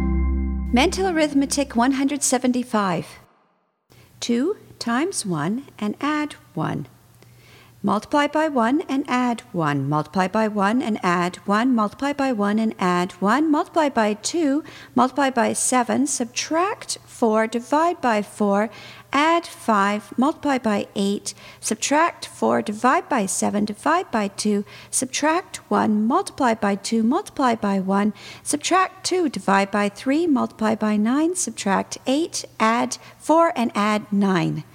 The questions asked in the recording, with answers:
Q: 2 times 1 and add 1. Multiply by 1 and add 1. Multiply by 1 and add 1. Multiply by 1 and add 1. Multiply by 2. Multiply by 7. Subtract 4. Divide by 4. Add 5. Multiply by 8. Subtract 4. Divide by 7. Divide by 2. Subtract 1. Multiply by 2. Multiply by 1. Subtract 2. Divide by 3. Multiply by 9. Subtract 8. Add 4 and add 9.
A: And the answer is 77.